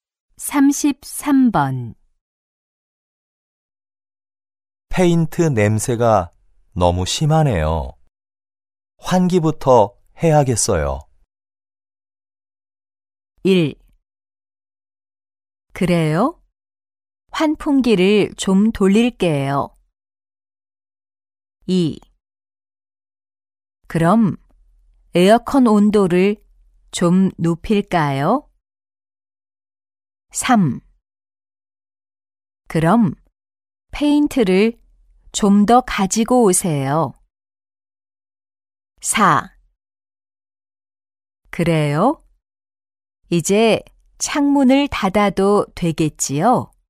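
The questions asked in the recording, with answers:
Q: 페인트 냄새가 너무 심하네요. 환기부터 해야겠어요.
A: 1: 그래요? 환풍기를 좀 돌릴게요.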